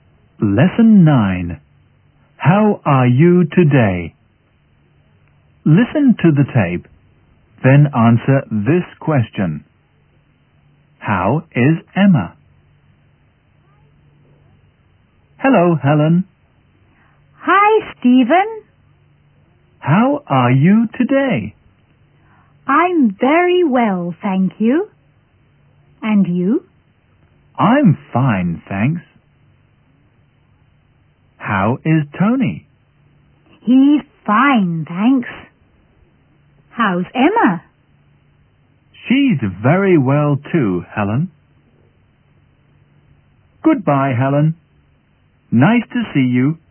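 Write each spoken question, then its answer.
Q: How is Emma?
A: She's very well.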